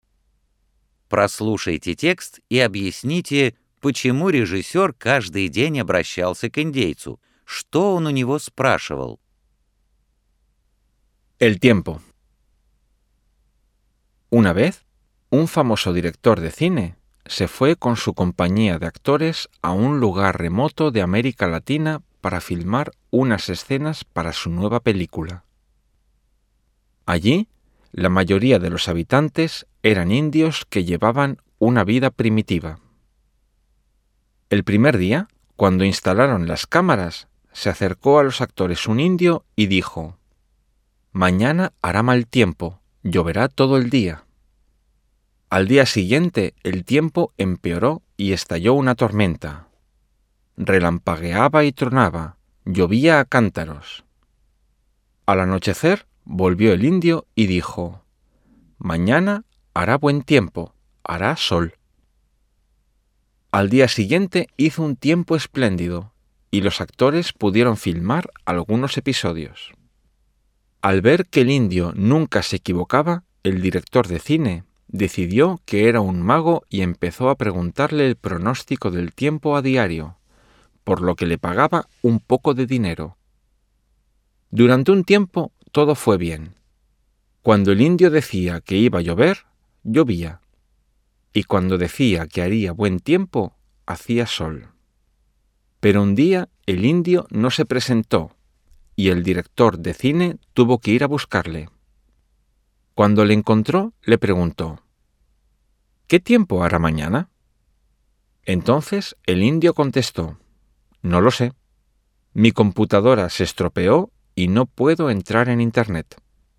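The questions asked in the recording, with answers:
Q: Прослушайте текст и объясните, почему режиссер каждый день обращался к индейцу.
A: Потому что индеец никогда не ошибался в прогнозе погоды, и режиссёр решил, что он волшебник

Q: Что он у него спрашивал?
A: Прогноз погоды (какая погода будет завтра)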